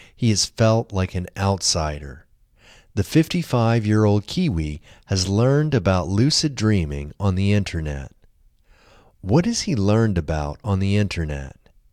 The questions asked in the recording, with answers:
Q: What has he learned about on the internet?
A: He has learned about lucid dreaming on the internet.